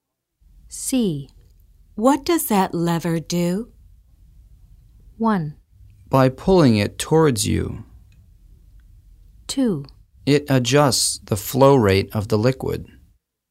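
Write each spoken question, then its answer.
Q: What does that lever do?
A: 2: It adjusts the flow rate of the liquid.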